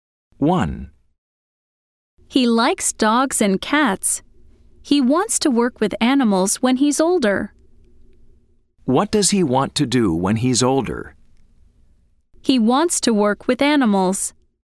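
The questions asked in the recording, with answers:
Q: What does he want to do when he's older?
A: True: He wants to work with animals.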